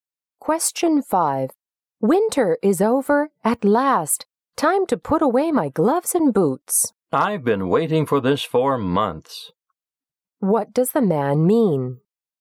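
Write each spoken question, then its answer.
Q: What does the man mean?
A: He is glad that winter is finally over.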